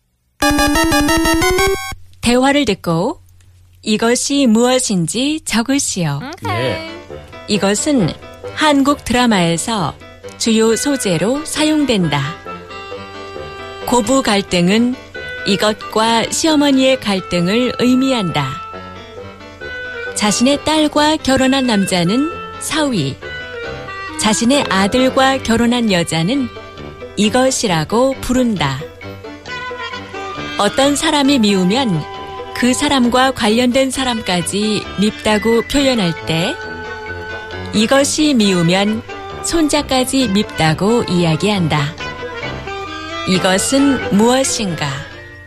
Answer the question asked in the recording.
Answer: It's the 며느리.